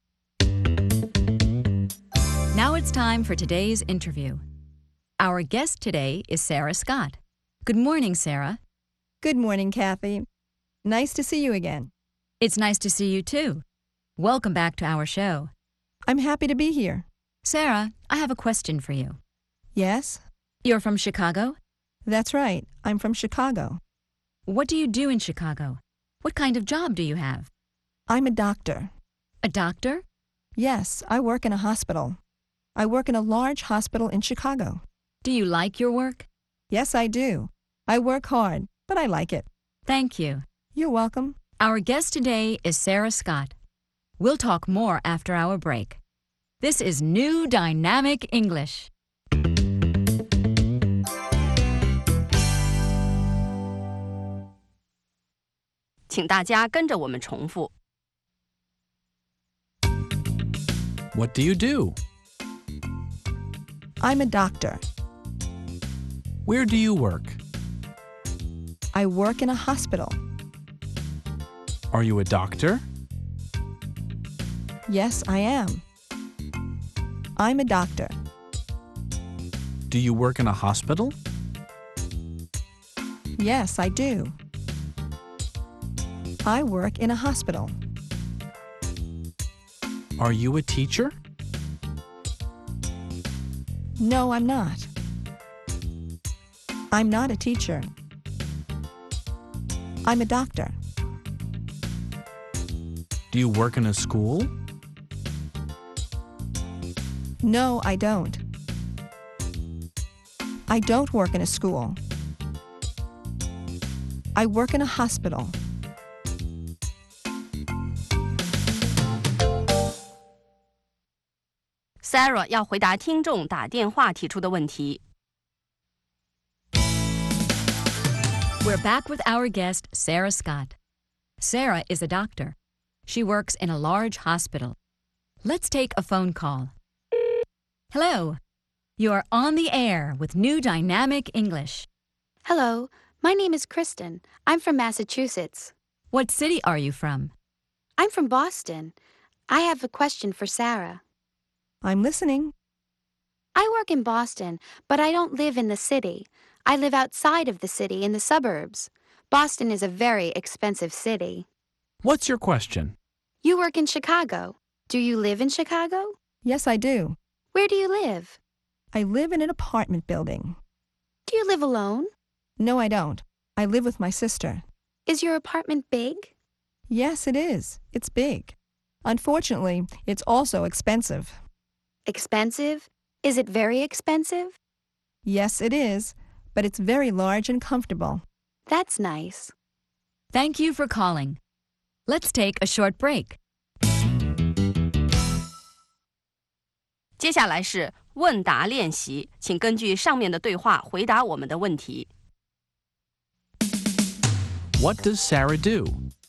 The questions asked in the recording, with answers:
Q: What does Sarah do?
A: She's a doctor.